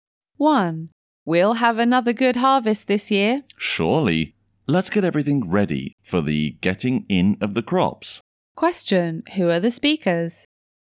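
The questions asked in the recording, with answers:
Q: Who are the speakers?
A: Farmers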